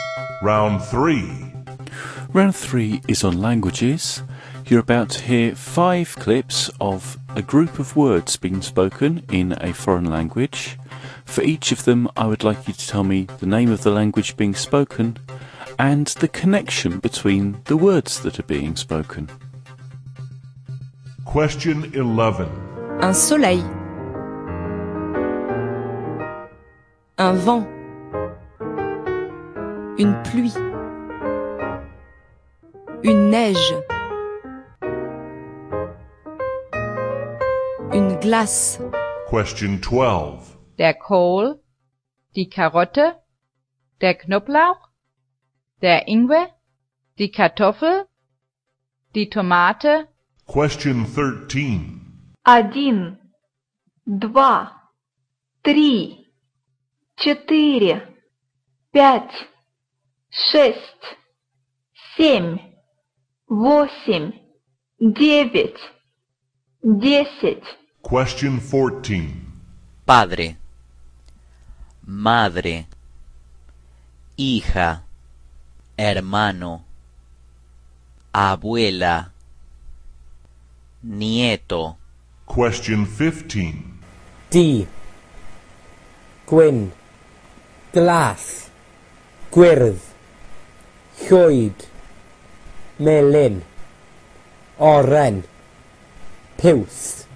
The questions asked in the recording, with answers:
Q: Un soleil.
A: the answer to number 11 was French, and the words were all about the weather

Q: der Kohl, die Karotte, der Knoblauch, der Ingwer, die Kartoffel, die Tomate.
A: Number 12 was German, and all the words were

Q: Один, два, три, четыре, пять, шесть, семь, восемь, девять, десять.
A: Number 13 was Russian numbers.

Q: Padre, madre, hija, hermano, abuela, nieto.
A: Number 14 was Spanish, and they were all words

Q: D. Gwen. Glass.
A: number 15 was Welsh, and all those words were colours